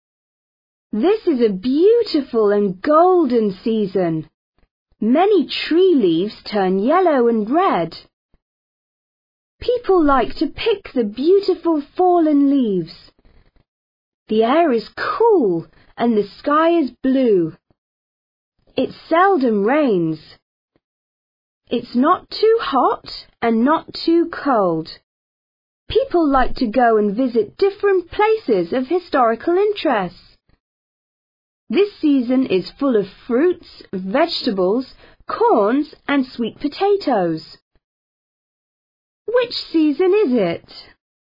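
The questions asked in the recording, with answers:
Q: Which season is it?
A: autumn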